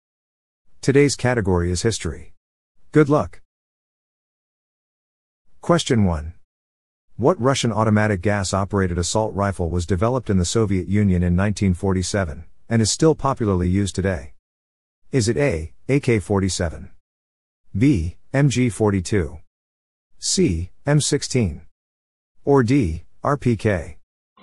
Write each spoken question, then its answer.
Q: What Russian automatic gas-operated assault rifle was developed in the Soviet Union in 1947, and is still popularly used today?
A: The answer is A, AK-47.